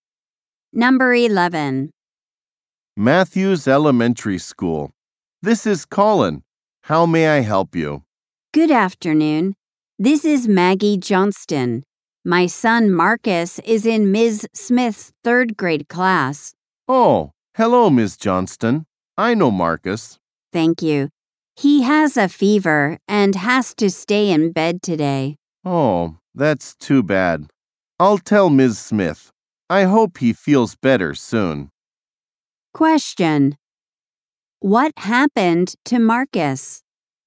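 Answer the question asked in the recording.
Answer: He has a fever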